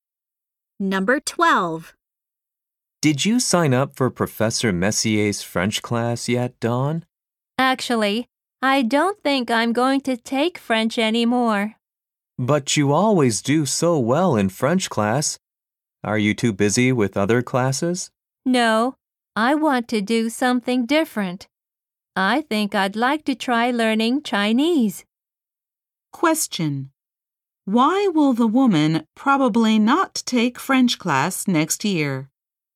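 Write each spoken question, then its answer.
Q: Why will the woman probably not take French class next year?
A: She wants to try learning Chinese instead.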